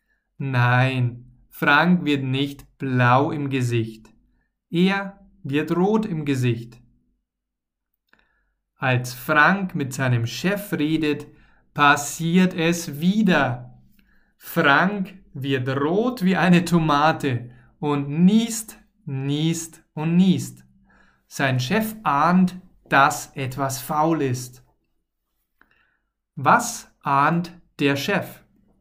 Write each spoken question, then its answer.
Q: Was ahnt der Chef?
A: Er ahnt, dass etwas faul ist.